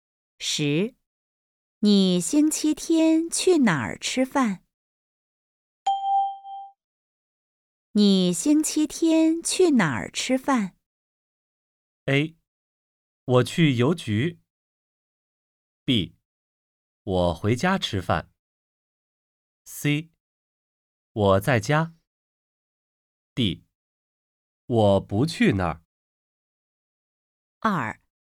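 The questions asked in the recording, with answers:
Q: 你星期天去哪儿吃饭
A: B: 我回家吃饭。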